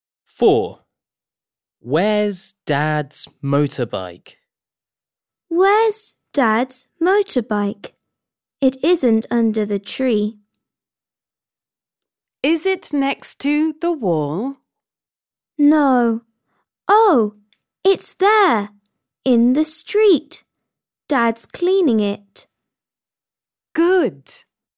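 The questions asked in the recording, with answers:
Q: Where's Dad's motorbike?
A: in the street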